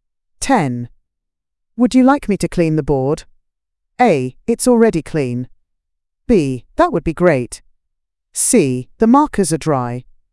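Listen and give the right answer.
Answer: B: That would be great.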